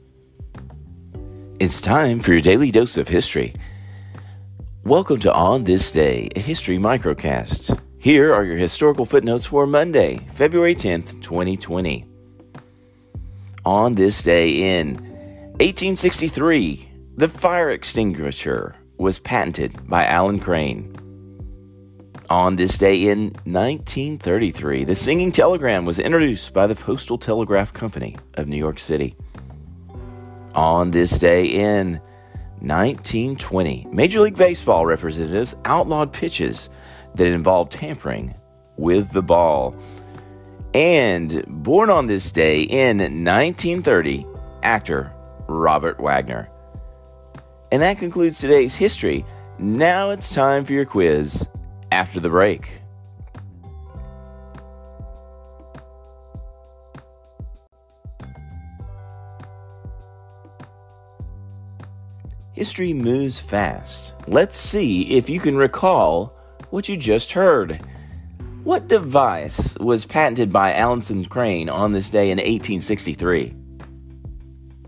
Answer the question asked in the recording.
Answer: Answer, the fire extinguisher.